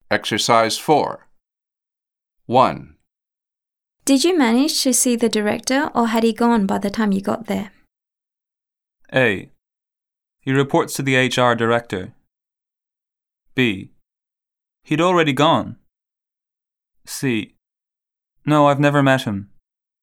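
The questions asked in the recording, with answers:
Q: Did you manage to see the director or had he gone by the time you got there?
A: B: He'd already gone.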